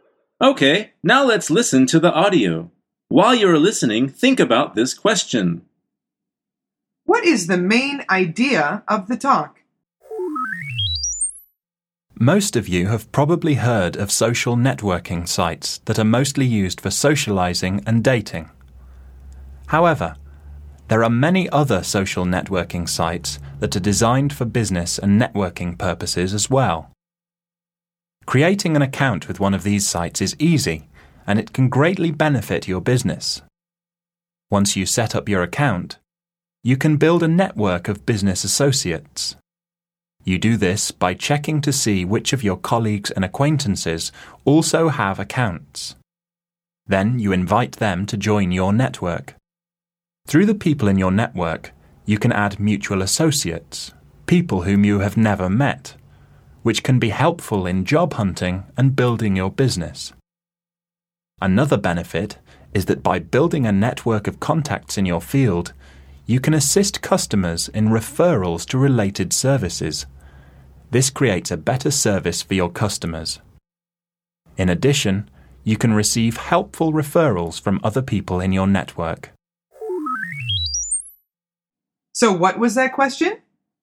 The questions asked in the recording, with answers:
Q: What is the main idea of the talk?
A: The answer is building business contacts with social networks.